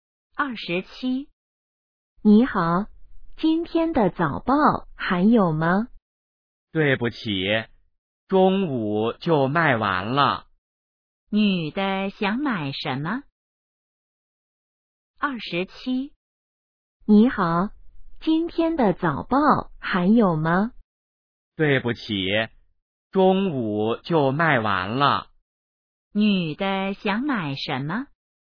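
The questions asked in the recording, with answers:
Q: 女的想买什么?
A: 今天的早报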